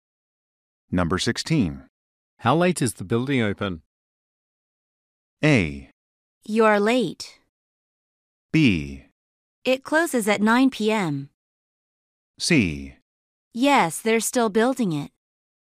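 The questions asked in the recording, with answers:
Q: How late is the building open?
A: B: It closes at 9 p.m.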